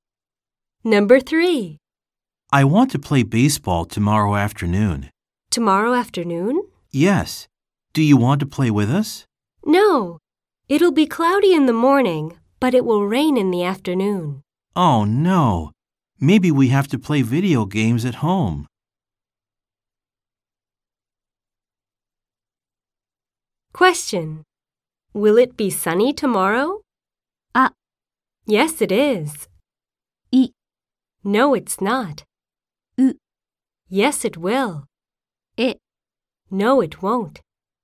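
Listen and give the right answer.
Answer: E: No, it won't.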